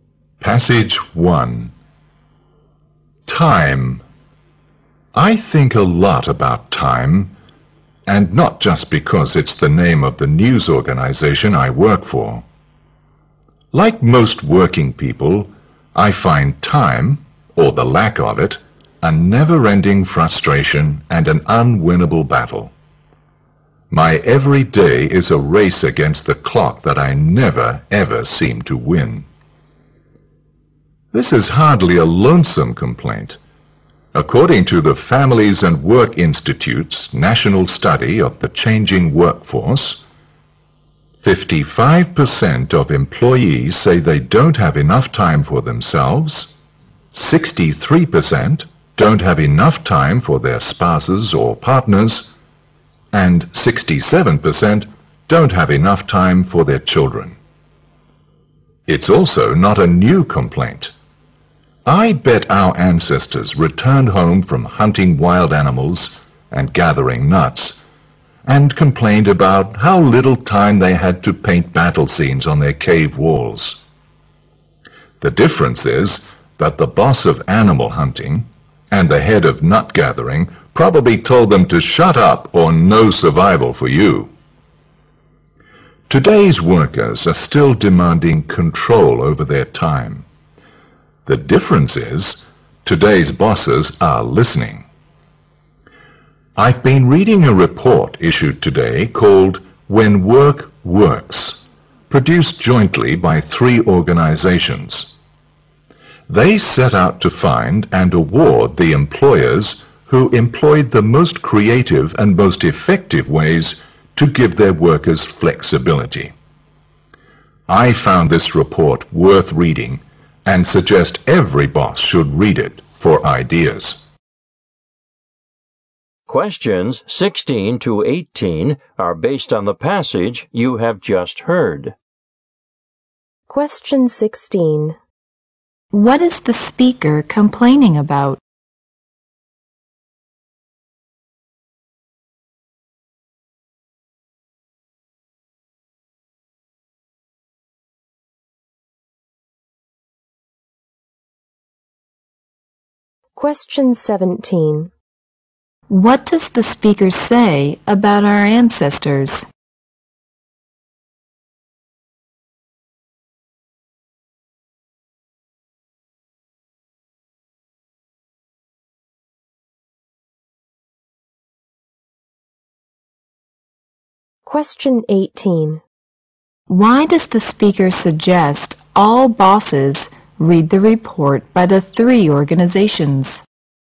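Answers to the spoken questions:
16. Not having enough time
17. They also complained about not having enough time
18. To get ideas for giving workers flexible time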